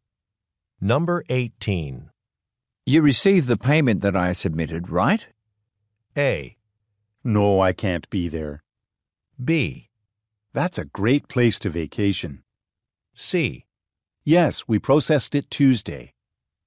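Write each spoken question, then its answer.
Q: You received the payment that I submitted, right?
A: C: Yes, we processed it Tuesday.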